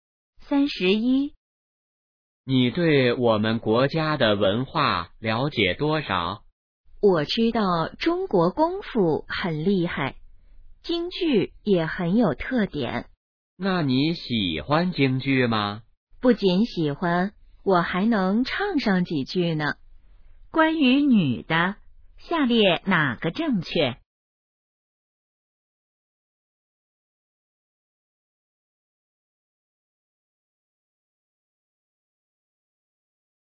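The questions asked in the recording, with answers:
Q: 下列哪个正确?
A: 女的喜欢京剧,还会唱几句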